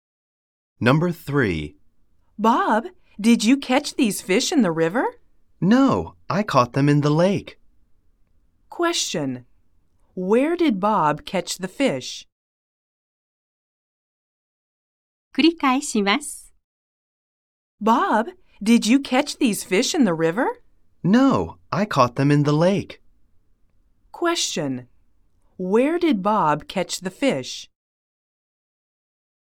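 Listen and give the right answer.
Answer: In the lake.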